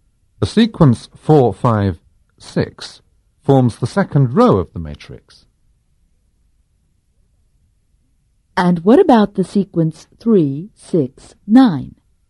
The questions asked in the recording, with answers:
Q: And what about the sequence 3, 6, 9?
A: The sequence 3, 6, 9 forms the third column of the matrix.